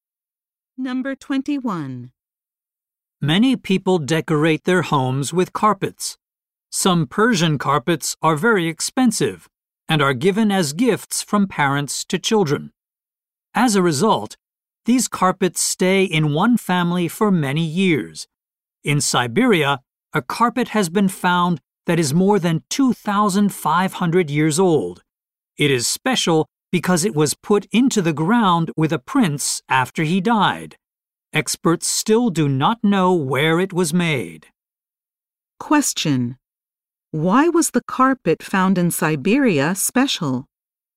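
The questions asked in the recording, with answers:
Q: Why was the carpet found in Siberia special?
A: It was buried with a prince after he died.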